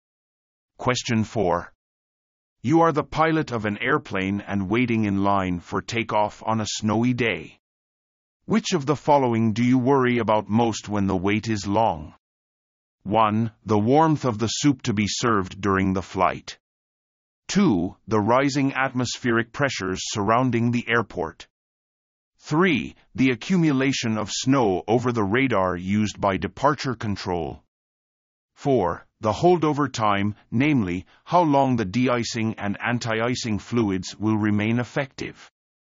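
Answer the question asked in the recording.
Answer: 4: The holdover time, namely, how long the de-icing and anti-icing fluids will remain effective.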